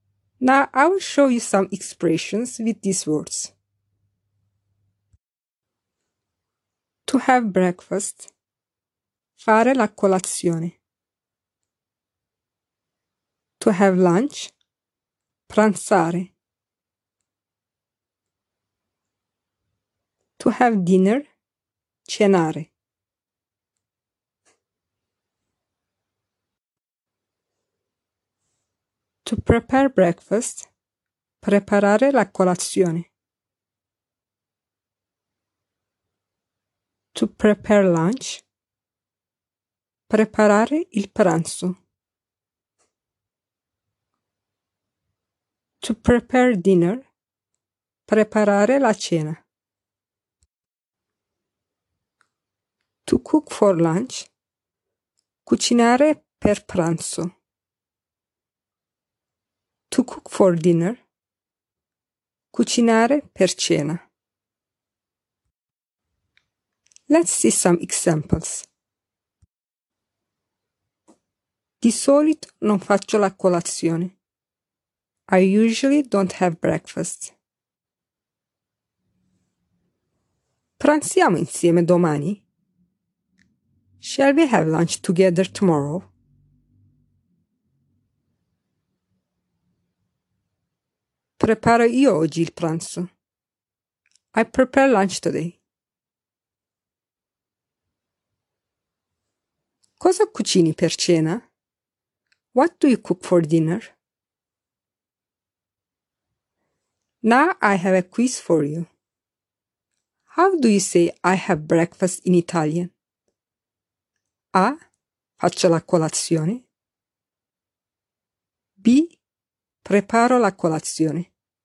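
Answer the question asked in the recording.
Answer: A: Faccio la colazione.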